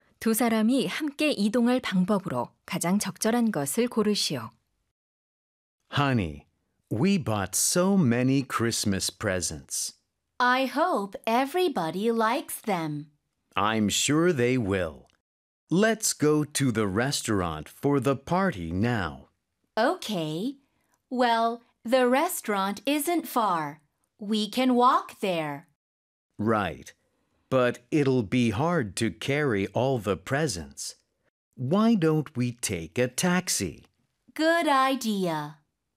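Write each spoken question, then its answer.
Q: 두 사람이 함께 이동할 방법으로 가장 적절한 것을 고르시오.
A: 택시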